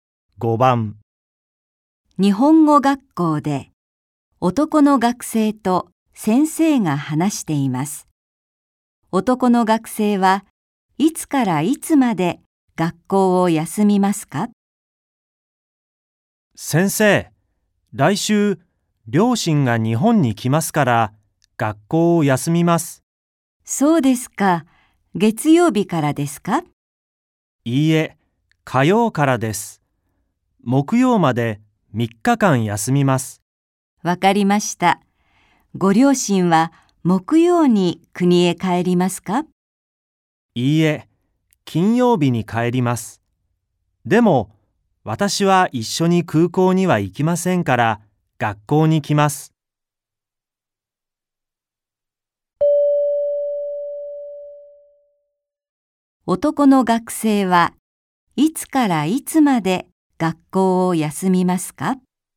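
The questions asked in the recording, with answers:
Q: 男の学生はいつからいつまで学校を休みますか?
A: 火曜日から木曜日まで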